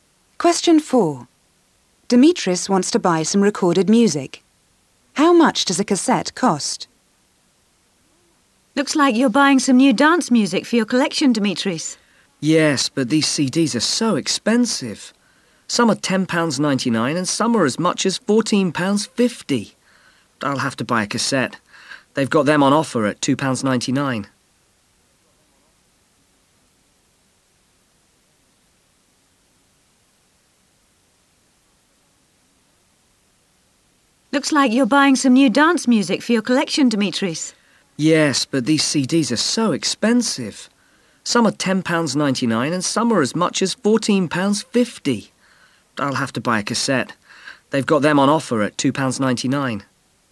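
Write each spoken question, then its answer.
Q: How much does a cassette cost?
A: £2.99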